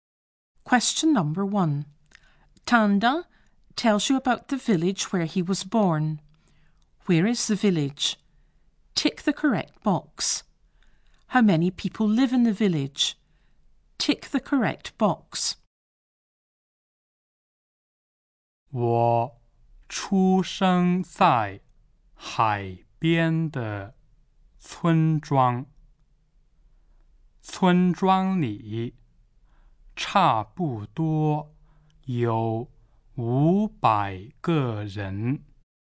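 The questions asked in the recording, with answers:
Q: Where is the village?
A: By the sea

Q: How many people live in the village?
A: About 500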